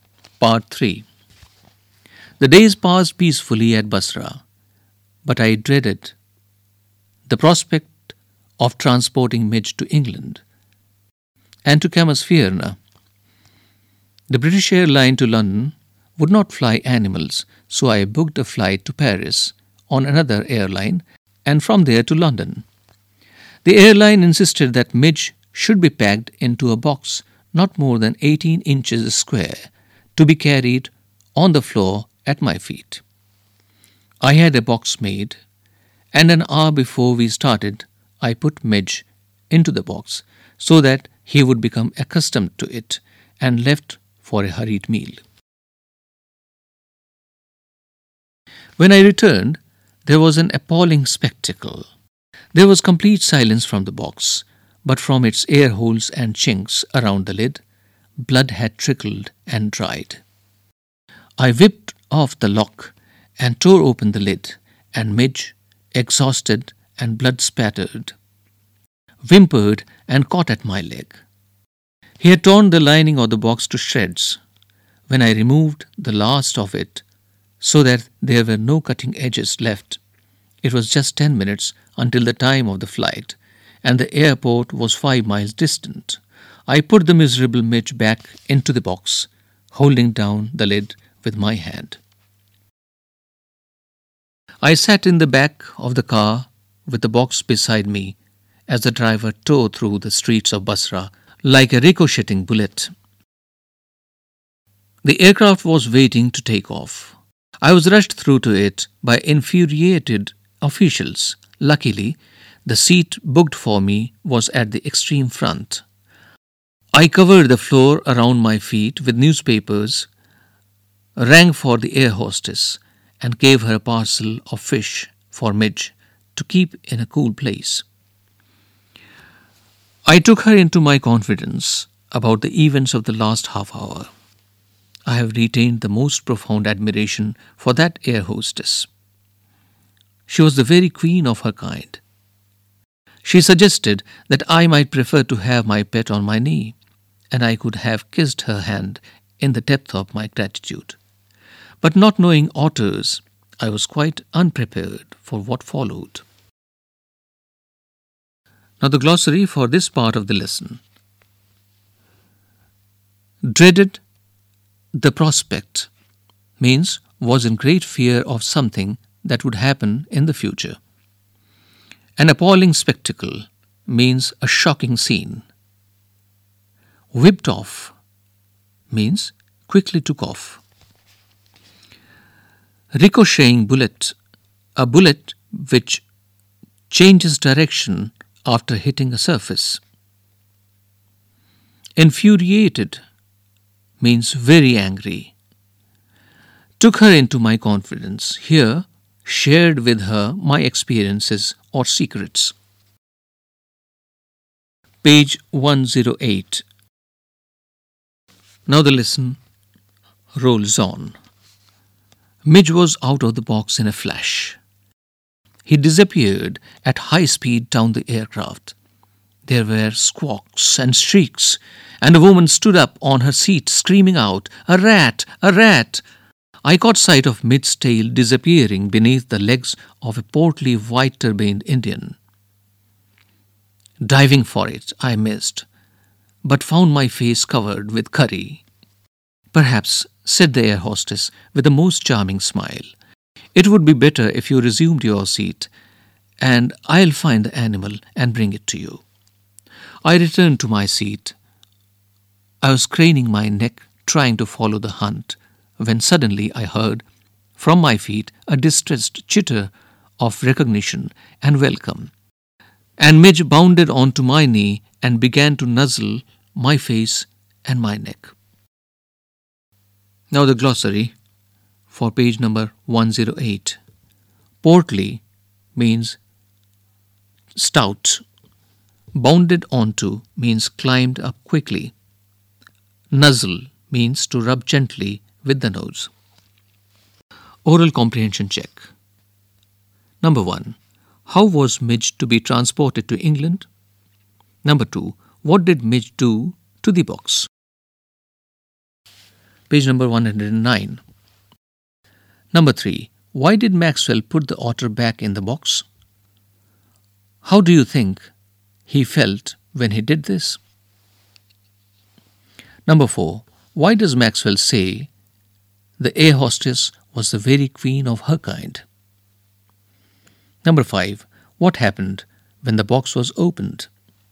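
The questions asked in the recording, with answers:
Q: How was Midge to be transported to England?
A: In a box no more than 18 inches square on the floor of the plane, flying to Paris and then to London

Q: What did Midge do to the box?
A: He tore the lining to shreds and was bleeding

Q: Why did Maxwell put the otter back in the box? How do you think he felt when he did this?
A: There was no time left before the flight; he felt sad and worried

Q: Why does Maxwell say the air hostess was the very queen of her kind?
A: She was kind and understanding, and she let him keep the otter on his knee

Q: What happened when the box was opened?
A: Midge escaped and ran down the aircraft, causing panic among the passengers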